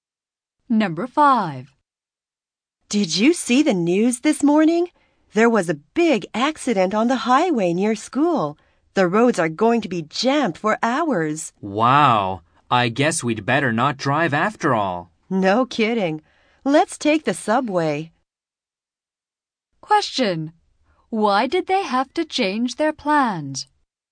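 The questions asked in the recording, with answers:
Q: Why did they have to change their plans?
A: There was a big accident on the highway, so the roads will be jammed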